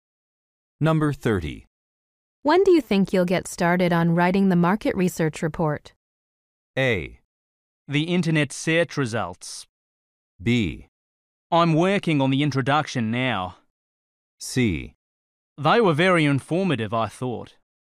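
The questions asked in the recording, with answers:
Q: When do you think you'll get started on writing the market research report?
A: B: I'm working on the introduction now.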